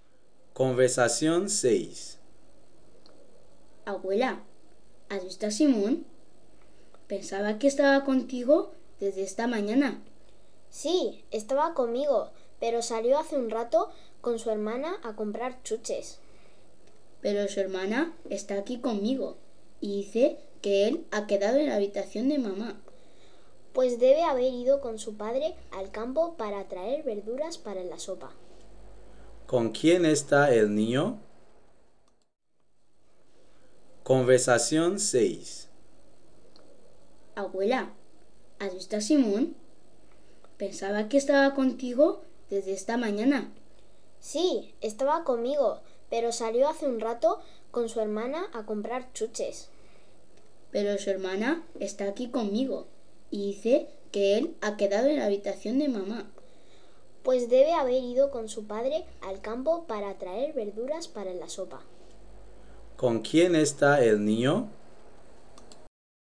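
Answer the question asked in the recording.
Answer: Con su padre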